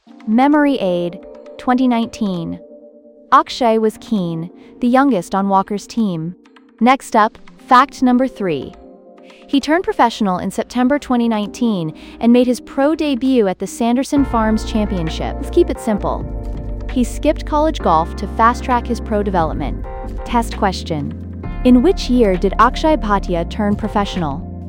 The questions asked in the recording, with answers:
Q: In which year did Akshay Bhatia turn professional?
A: Correct answer, 2019.